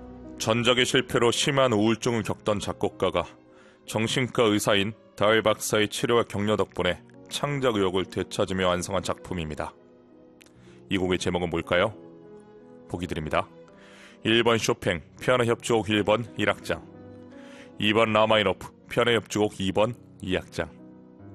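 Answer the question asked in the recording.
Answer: 2번: 라마이노프, 피아노 협주곡 2번 2악장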